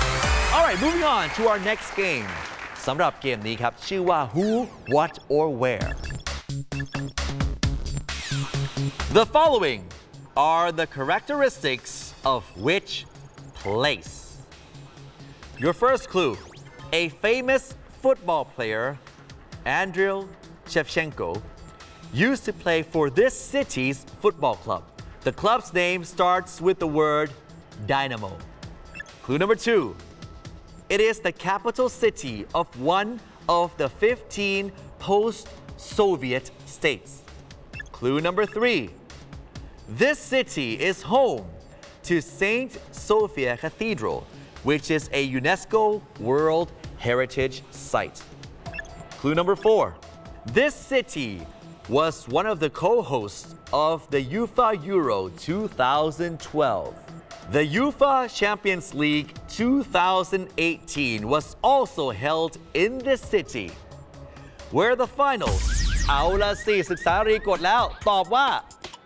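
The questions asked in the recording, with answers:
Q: The following are the characteristics of which place?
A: Kyiv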